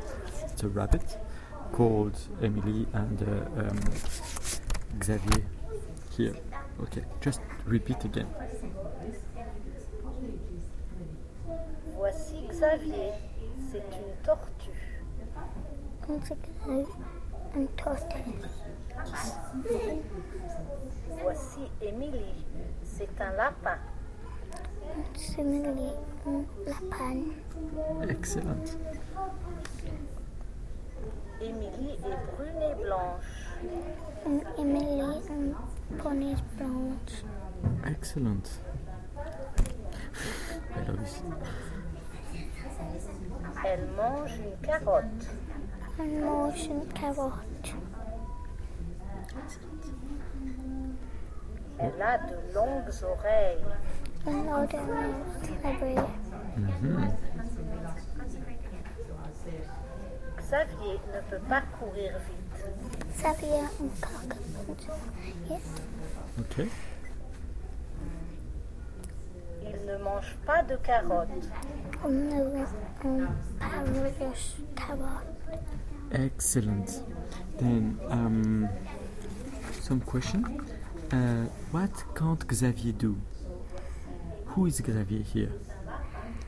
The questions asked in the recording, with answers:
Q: What can't Xavier do?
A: Can't run very fast.